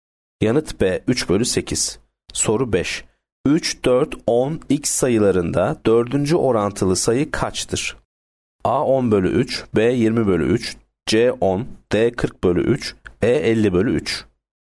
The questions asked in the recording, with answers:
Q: orantılı sayı kaçtır?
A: Yanıt D 40 bölü 3.